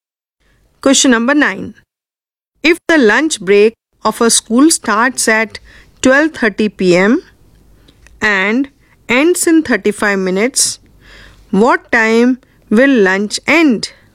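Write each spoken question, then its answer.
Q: what time will lunch end?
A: 1:05 p.m.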